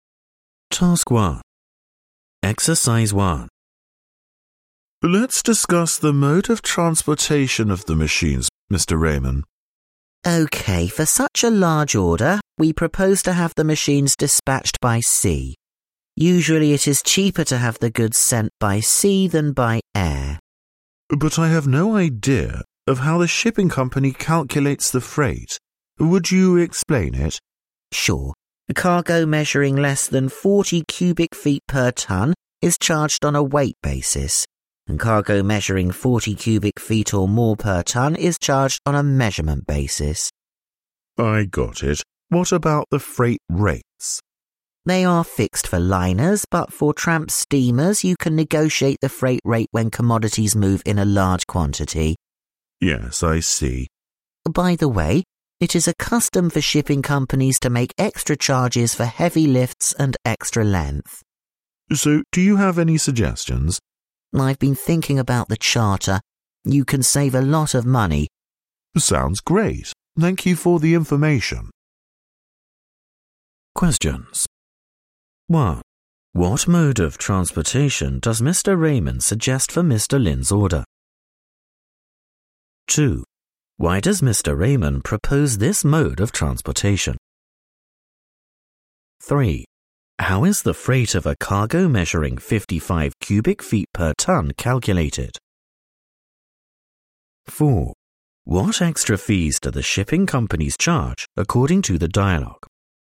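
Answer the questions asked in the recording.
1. By sea
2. It is usually cheaper to send goods by sea than by air, and it is a large order
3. On a measurement basis
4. Extra charges for heavy lifts and extra length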